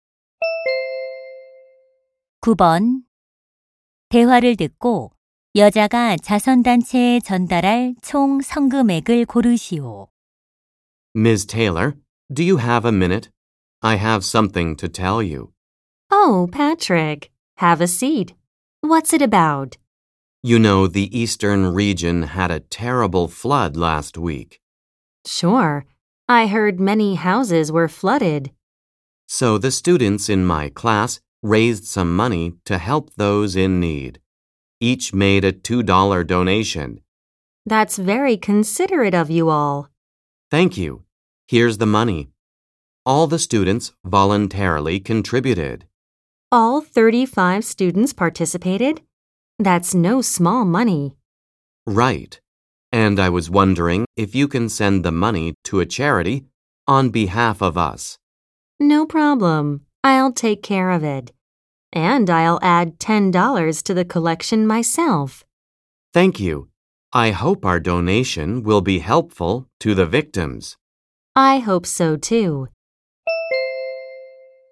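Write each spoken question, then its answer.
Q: 대화를 듣고 여자가 자선단체에 전달할 총 성금액을 고르시오.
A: 80달러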